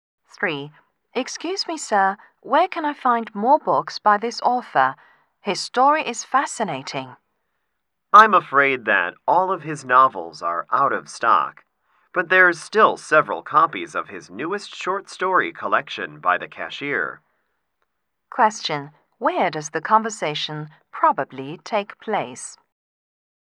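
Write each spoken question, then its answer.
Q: Where does the conversation probably take place?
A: In a bookstore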